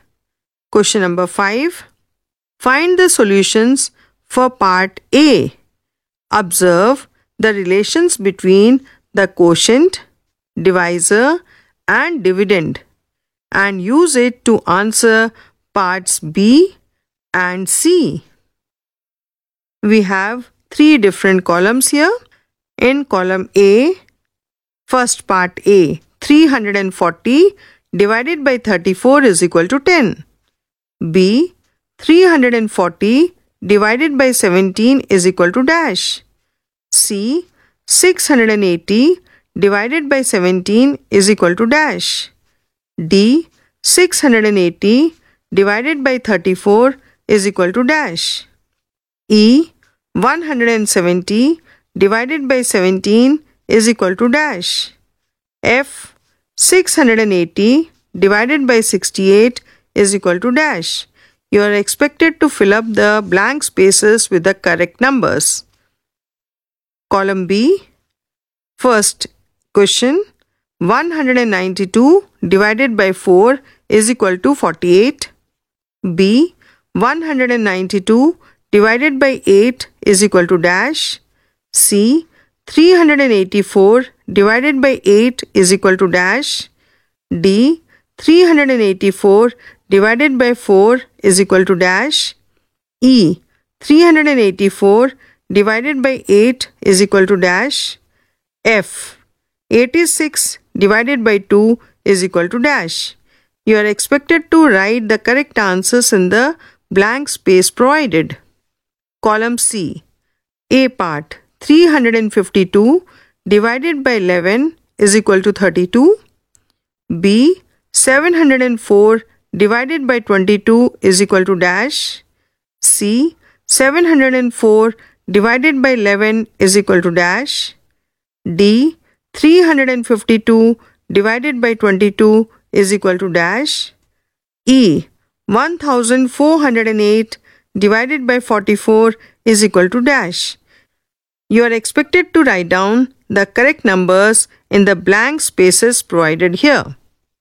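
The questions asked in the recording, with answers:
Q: B, 340 divided by 17 is equal to dash.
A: 20

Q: C, 680 divided by 17 is equal to dash.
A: 40

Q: D, 680 divided by 34 is equal to dash.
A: 20

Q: E, 170 divided by 17 is equal to dash.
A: 10

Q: F, 680 divided by 68 is equal to dash.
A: 10

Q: B. 192 divided by 8 is equal to dash.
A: 24

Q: C. 384 divided by 8 is equal to dash.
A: 48

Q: D. 384 divided by 4 is equal to dash.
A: 96

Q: 384 divided by 8 is equal to dash.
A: 48

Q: F. 86 divided by 2 is equal to dash.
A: 43

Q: B. 704 divided by 22 is equal to dash.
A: 32

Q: C. 704 divided by 11 is equal to dash.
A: 64

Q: D. 352 divided by 22 is equal to dash.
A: 16

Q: 1408 divided by 44 is equal to dash.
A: 32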